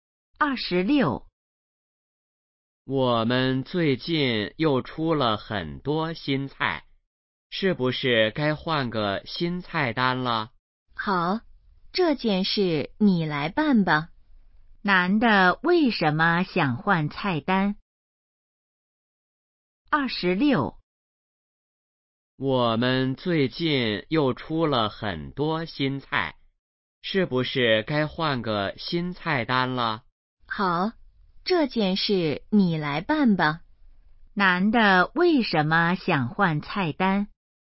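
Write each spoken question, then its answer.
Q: 男的为什么想换菜单?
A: 出了很多新菜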